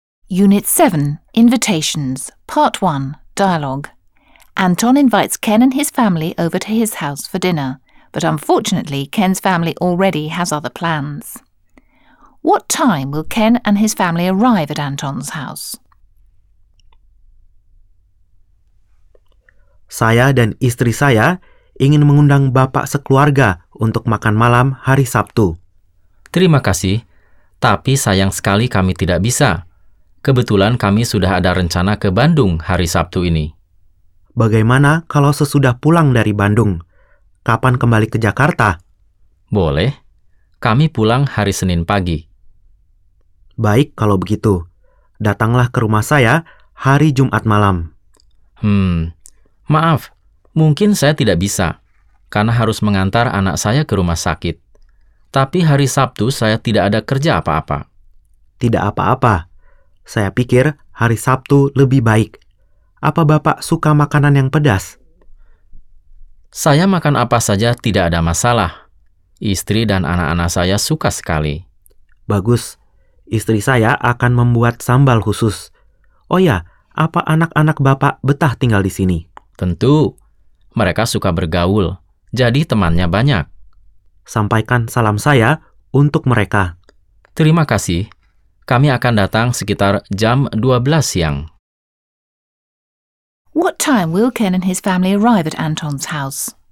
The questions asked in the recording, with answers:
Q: What time will Ken and his family arrive at Anton's house?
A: Around 12 in the afternoon.